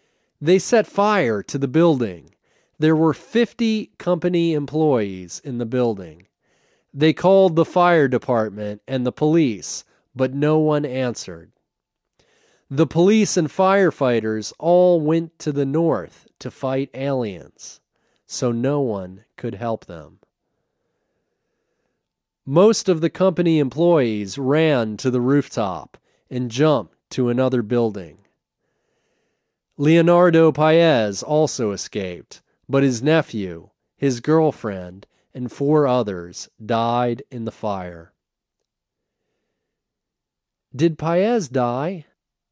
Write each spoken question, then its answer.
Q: Did Paez die?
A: No, Paez didn't die. He escaped.